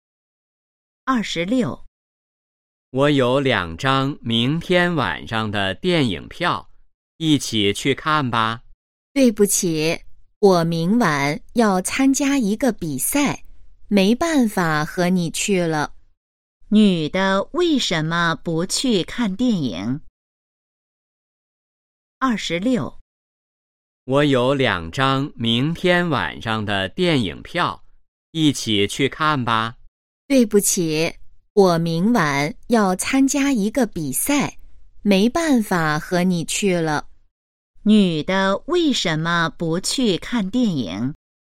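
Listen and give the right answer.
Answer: 她明晚要参加一个比赛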